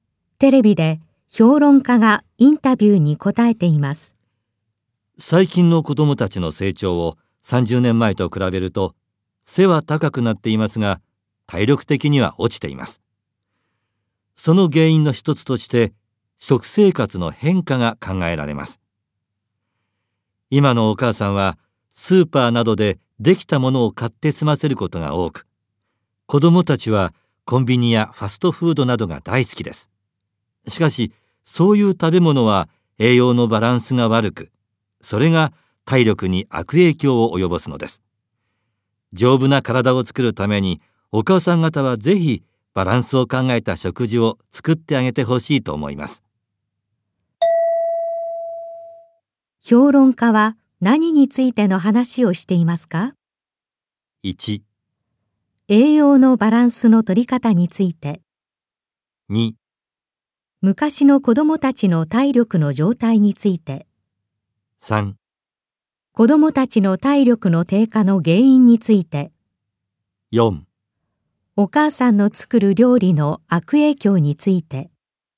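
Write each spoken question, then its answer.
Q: 評論家は何についての話をしていますか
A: 3: 子供たちの体力の低下の原因について。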